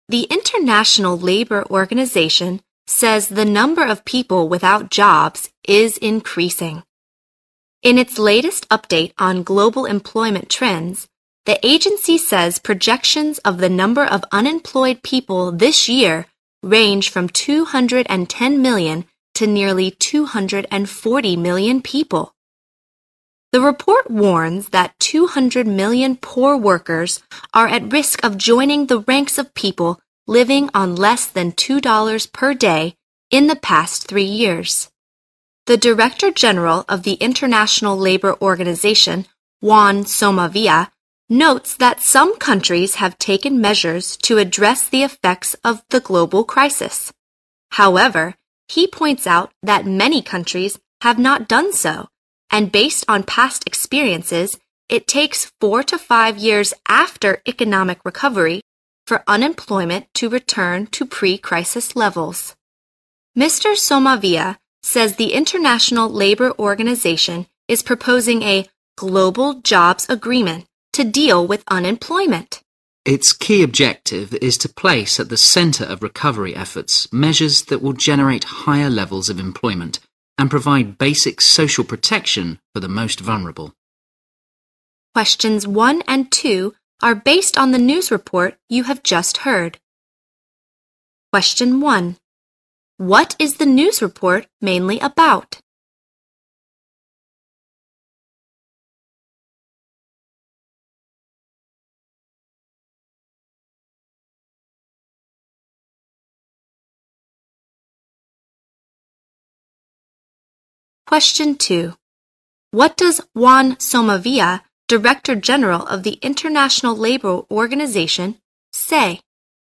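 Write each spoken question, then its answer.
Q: What is the news report mainly about?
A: The rising number of unemployed people worldwide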